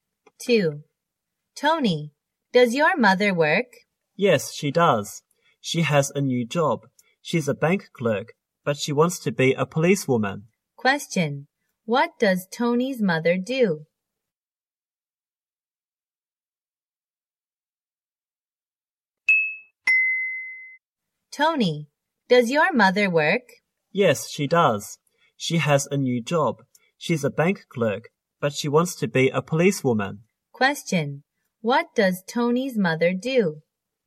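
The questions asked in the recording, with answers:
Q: What does Tony's mother do?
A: She's a bank clerk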